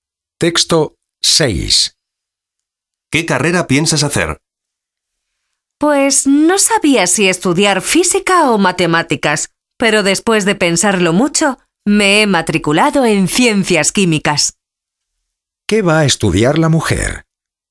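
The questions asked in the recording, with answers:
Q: ¿Qué va a estudiar la mujer?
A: Ciencias químicas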